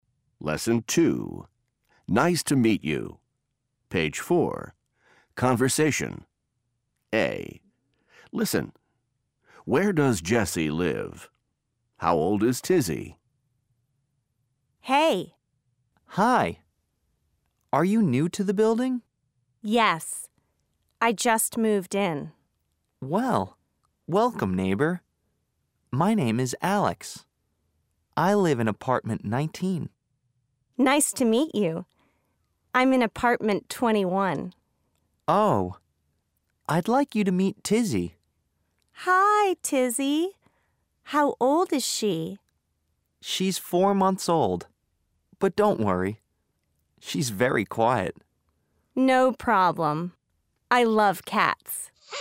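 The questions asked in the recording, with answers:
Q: How old is Tizzy?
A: 4 months old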